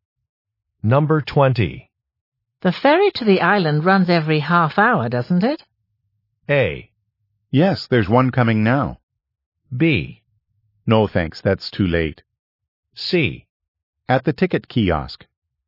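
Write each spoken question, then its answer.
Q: The ferry to the island runs every half hour, doesn't it?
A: A: Yes, there's one coming now.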